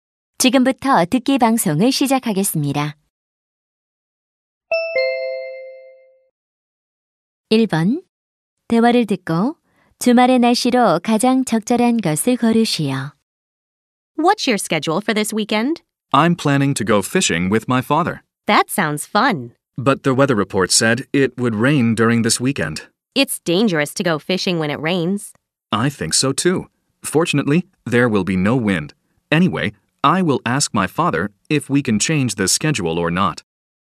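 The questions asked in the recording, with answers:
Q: 대화를 듣고 주말의 날씨로 가장 적절한 것을 고르시오.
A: 비가 오고 바람은 없음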